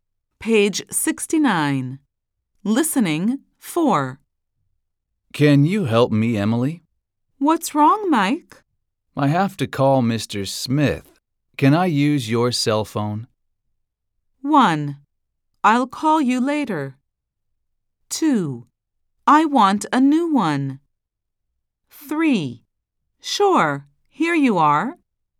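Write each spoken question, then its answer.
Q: Can I use your cell phone?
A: 3: Sure, here you are.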